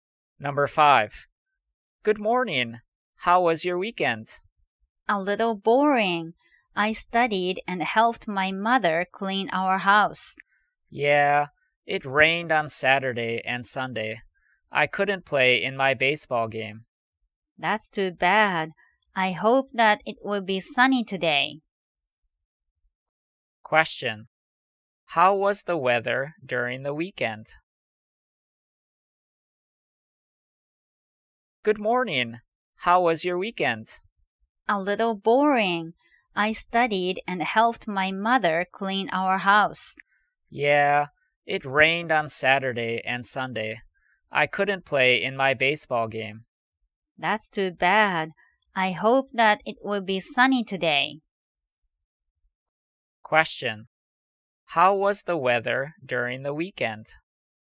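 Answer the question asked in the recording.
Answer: It was rainy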